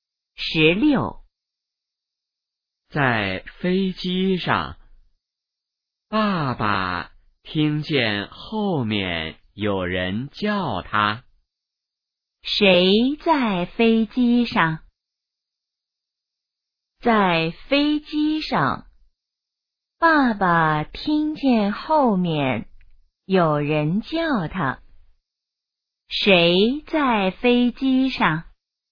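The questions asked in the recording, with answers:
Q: 谁在飞机上?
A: 爸爸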